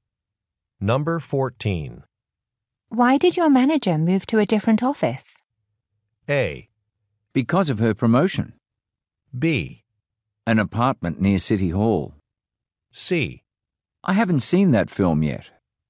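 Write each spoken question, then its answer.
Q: Why did your manager move to a different office?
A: A: Because of her promotion.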